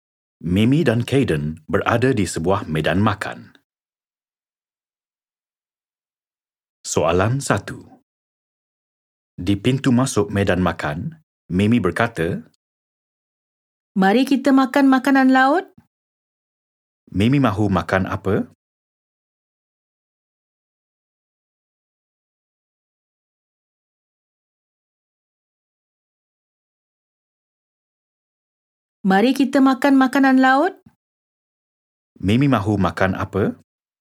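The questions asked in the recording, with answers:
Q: Mimi mahu makan apa?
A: makanan laut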